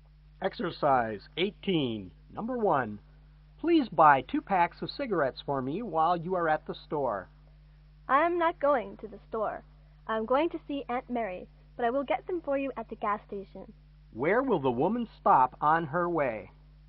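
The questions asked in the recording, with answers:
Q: Where will the woman stop on her way?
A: At the gas station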